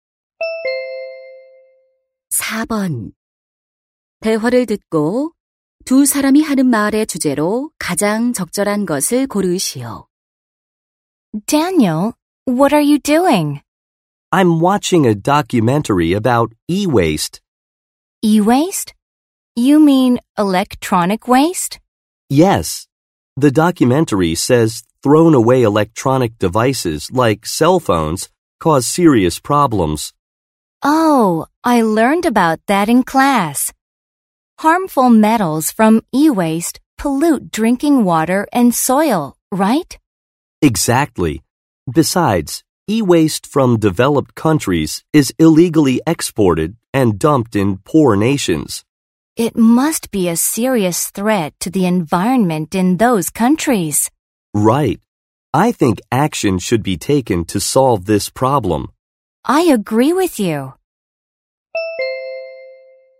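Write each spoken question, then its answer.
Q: 대화를 듣고 두 사람이 하는 말의 주제로 가장 적절한 것을 고르시오.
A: 전자 폐기물로 인한 문제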